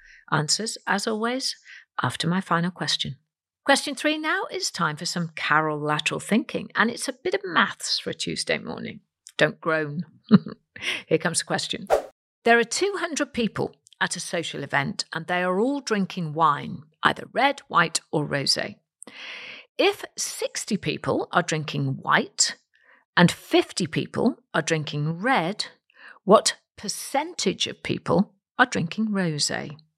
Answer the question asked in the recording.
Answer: And the answer is 45%.